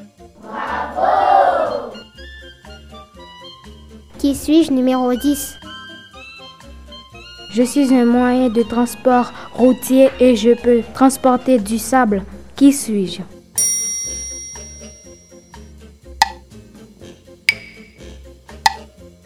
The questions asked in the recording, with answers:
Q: Qui suis-je?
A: un camion.